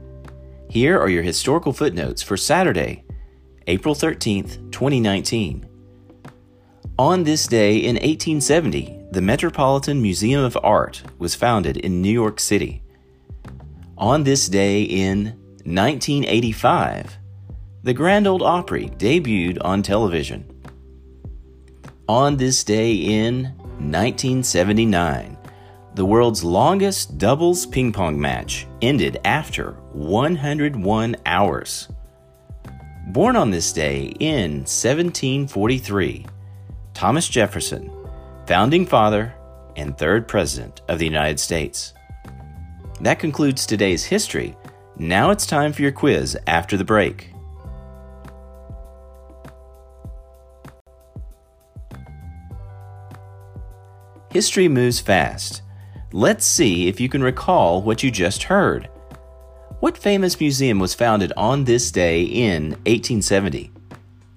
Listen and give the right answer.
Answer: the Metropolitan Museum of Art, aka the Met.